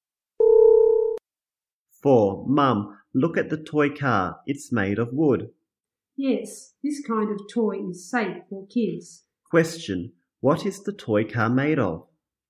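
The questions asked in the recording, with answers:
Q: Question, what is the toy car made of?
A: Wood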